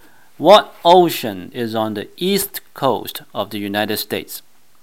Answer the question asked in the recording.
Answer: 答案是 Atlantic Ocean, 大西洋。